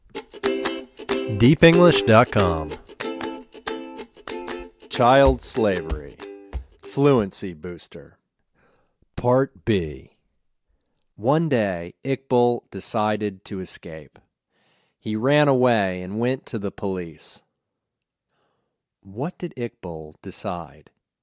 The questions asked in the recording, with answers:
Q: What did Iqbal decide?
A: He decided to escape.